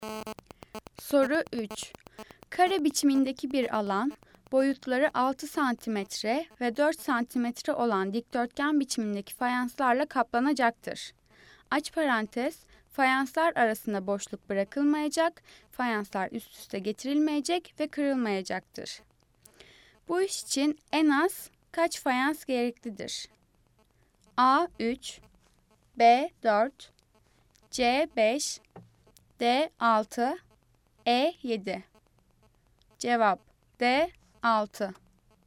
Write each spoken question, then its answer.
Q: Bu iş için en az kaç fayans gereklidir?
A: Cevap D 6.